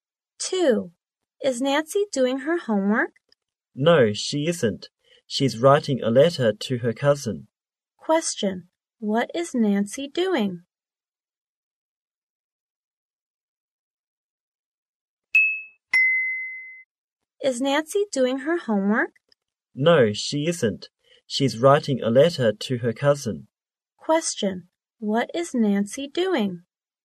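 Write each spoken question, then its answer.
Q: What is Nancy doing?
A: Writing a letter to her cousin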